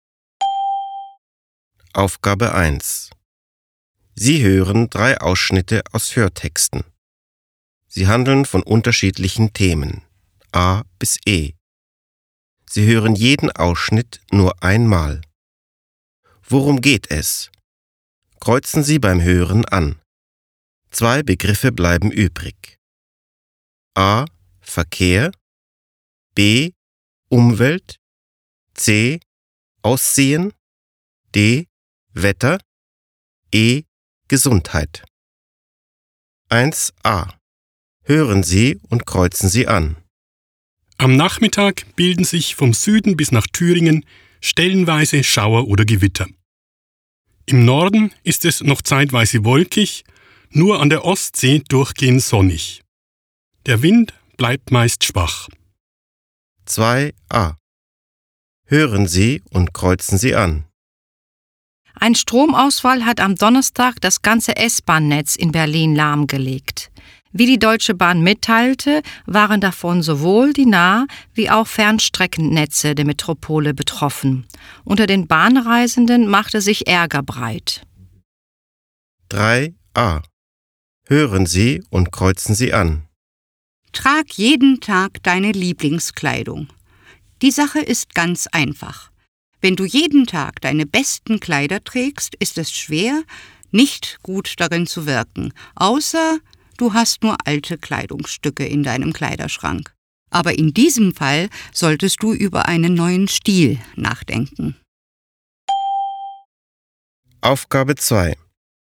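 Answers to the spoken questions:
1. D: Wetter
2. A: Verkehr
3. C: Aussehen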